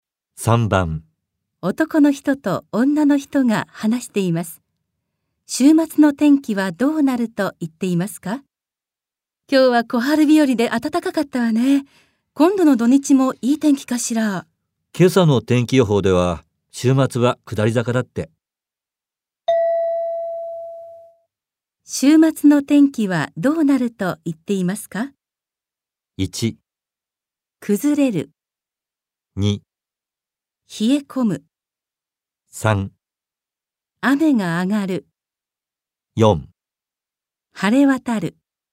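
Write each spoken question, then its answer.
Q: 週末の天気はどうなると言っていますか?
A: 1: 崩れる。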